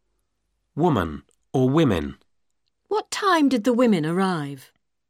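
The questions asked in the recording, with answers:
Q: Woman or women.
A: women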